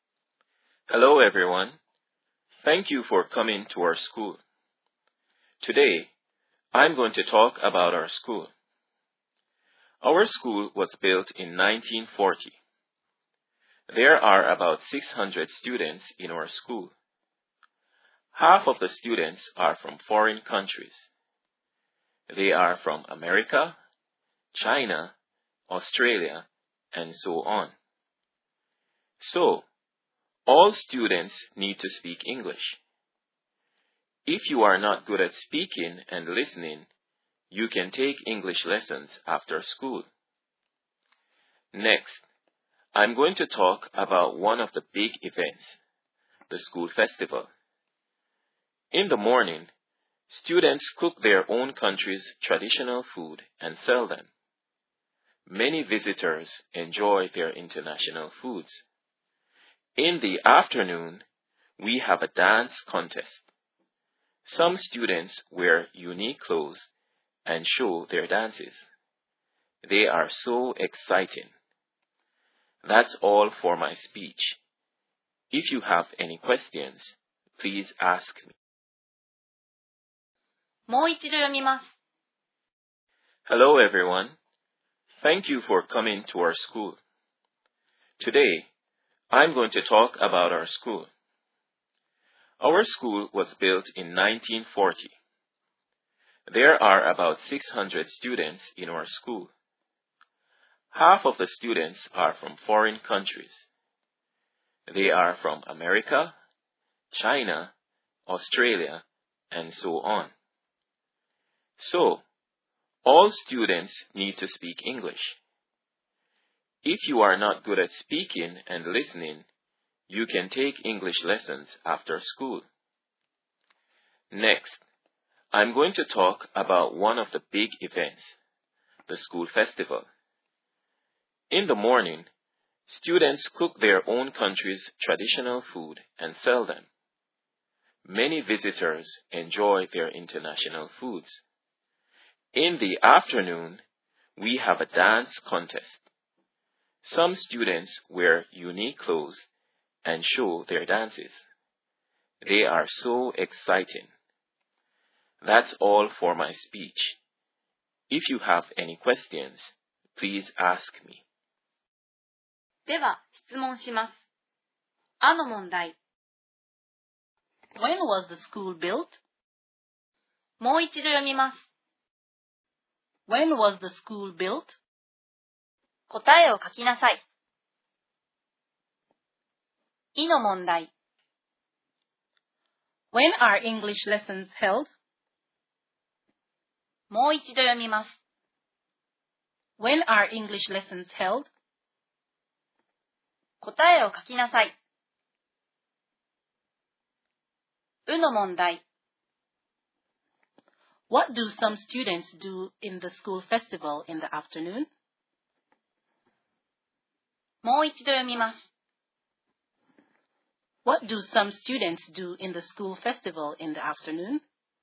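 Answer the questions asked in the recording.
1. In 1940
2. After school
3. They wear unique clothes and show their dances in a dance contest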